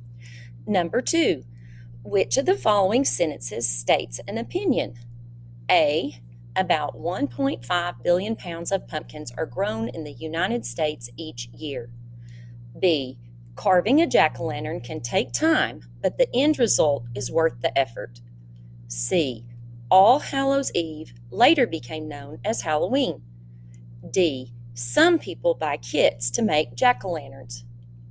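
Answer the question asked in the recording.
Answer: B: carving a jack-o'-lantern can take time, but the end result is worth the effort.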